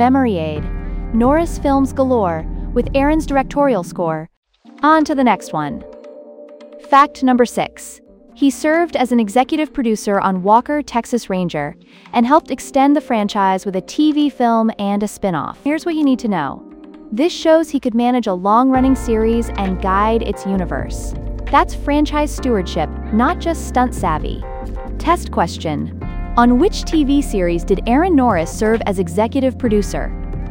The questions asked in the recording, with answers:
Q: on which TV series did Aaron Norris serve as executive producer?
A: Walker, Texas Ranger.